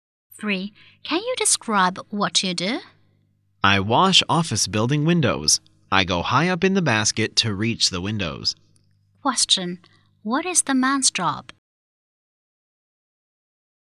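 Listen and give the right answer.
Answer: He is a window cleaner for office buildings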